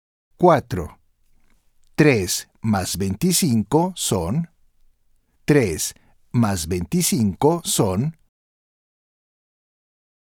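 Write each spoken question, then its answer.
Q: 3 más 25 son.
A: 28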